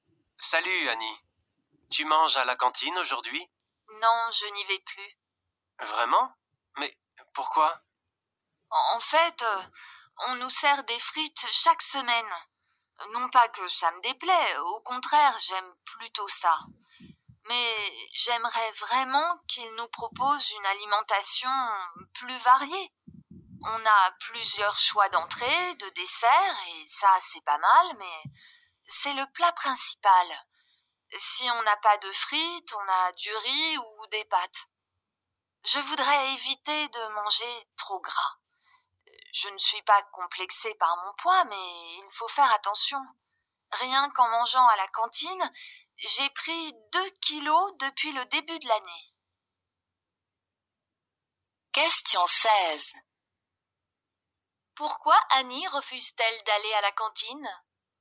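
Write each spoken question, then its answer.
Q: Pourquoi Annie refuse-t-elle d'aller à la cantine ?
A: Parce que les repas ne sont pas assez variés (trop de frites, trop gras)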